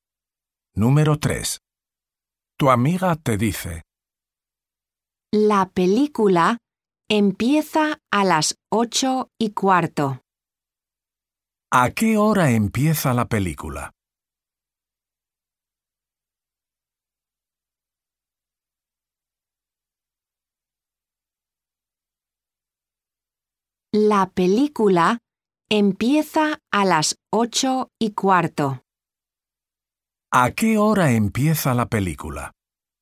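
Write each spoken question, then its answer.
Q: ¿A qué hora empieza la película?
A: a las 8:15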